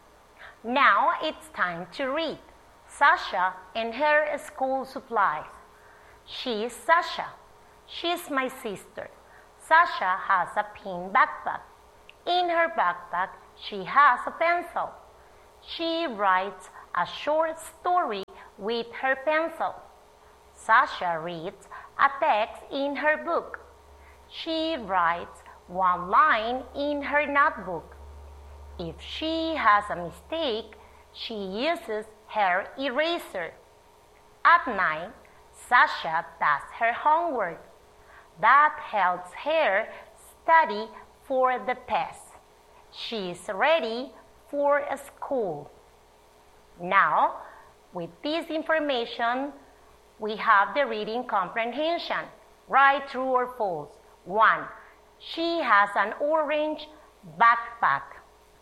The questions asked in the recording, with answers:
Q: She has an orange backpack.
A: Is false.